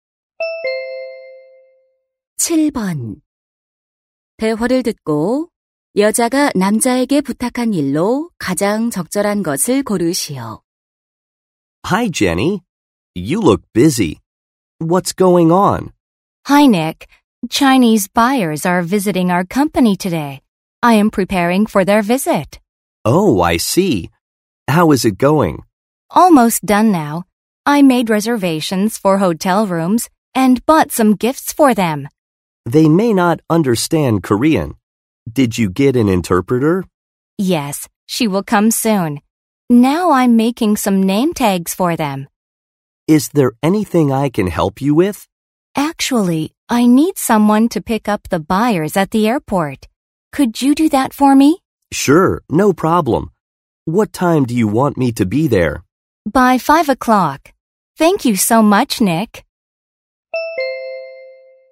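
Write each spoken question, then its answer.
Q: 대화를 듣고 여자가 남자에게 부탁한 일로 가장 적절한 것을 고르시오.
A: 공항에 바이어 마중 나가기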